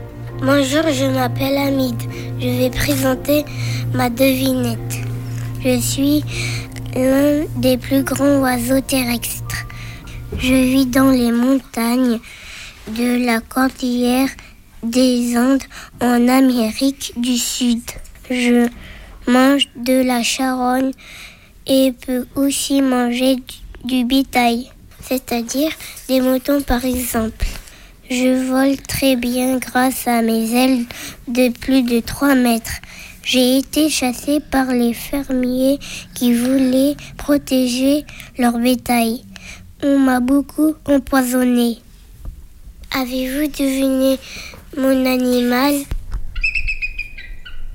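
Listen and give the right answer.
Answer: le condor des Andes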